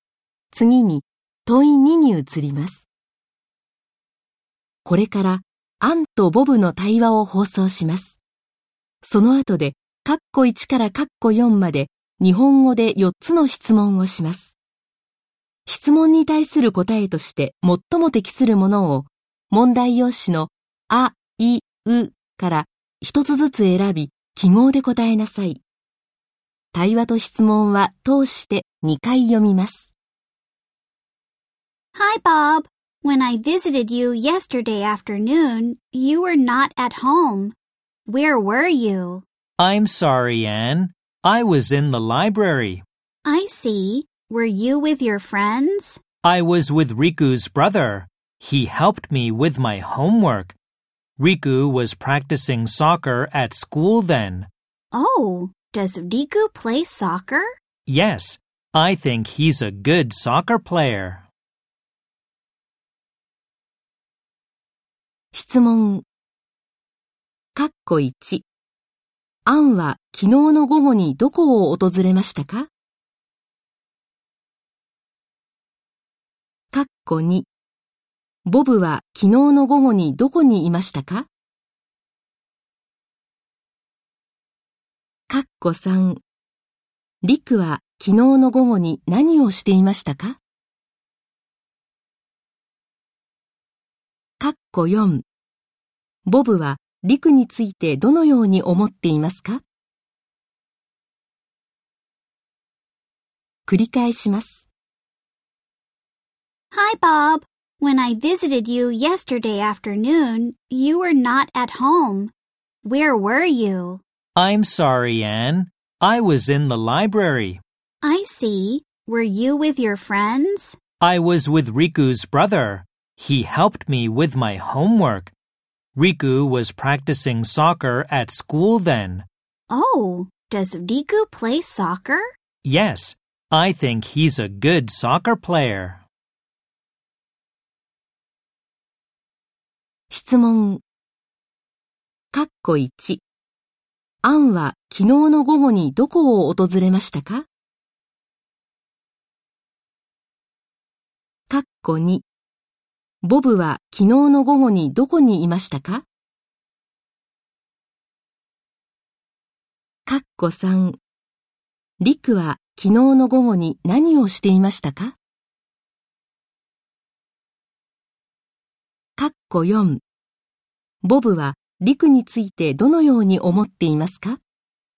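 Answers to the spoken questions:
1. ボブの家
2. 図書館
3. 学校でサッカーの練習をしていた
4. サッカーが上手な選手だと思っている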